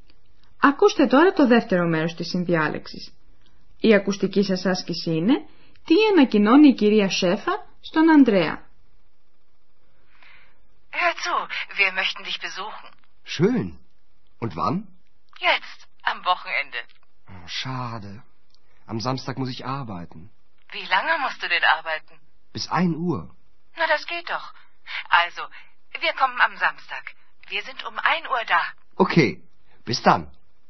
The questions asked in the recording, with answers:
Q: τι ανακοινώνει η κυρία Σέφα στον Ανδρέα.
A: Η μητέρα του Ανδρέα του λέει ότι οι γονείς του θα βρίσκονται κοντά του, δηλαδή στο ξενοδοχείο, στο Aachen, το Σάββατο στη 1.